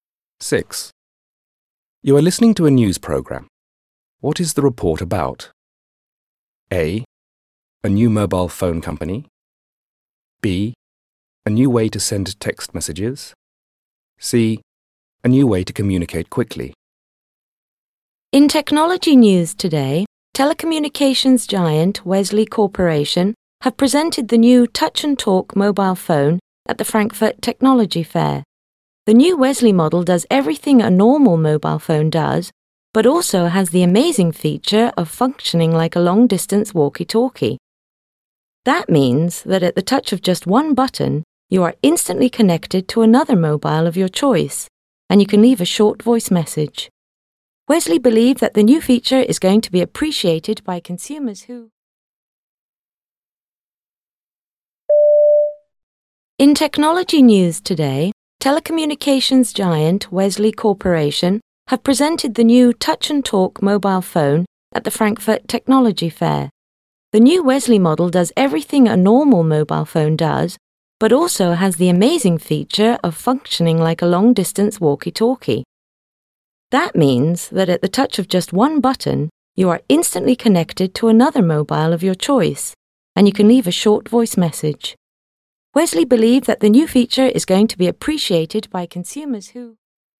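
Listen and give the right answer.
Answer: C: A new way to communicate quickly.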